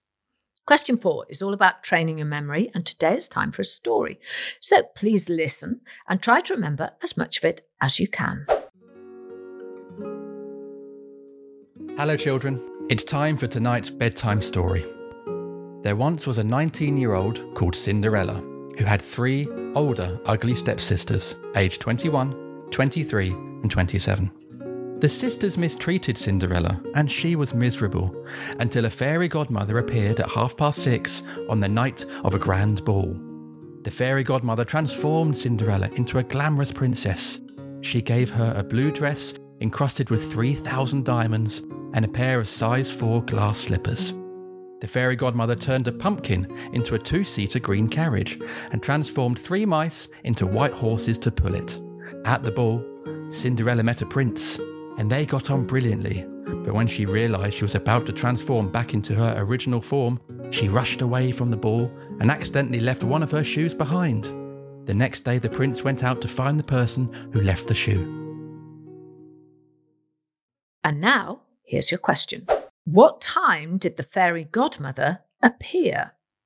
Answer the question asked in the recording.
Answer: the time I wanted you to say was 6:30 or 6:30 p.m.